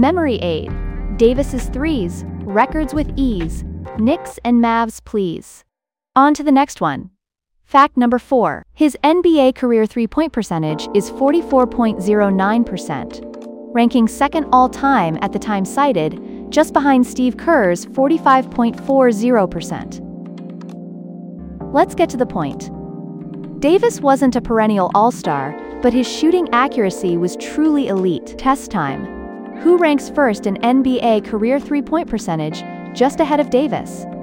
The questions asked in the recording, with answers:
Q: Who ranks first in NBA career three-point percentage, just ahead of Davis?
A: Correct answer? Steve Kerr.